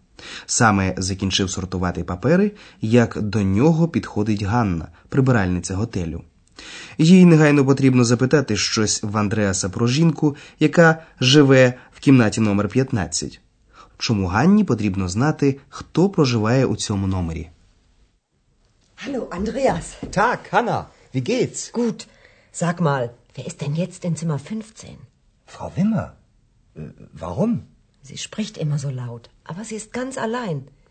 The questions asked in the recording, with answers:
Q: Чому Ганні потрібно знати, хто проживає у цьому номері?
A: Ганна помітила, що якась жінка у кімнаті номер 15 spricht immer so laut.